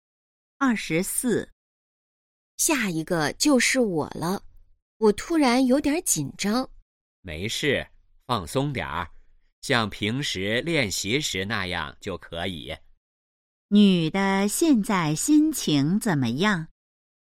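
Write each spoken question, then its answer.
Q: 女的现在心情怎么样?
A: 紧张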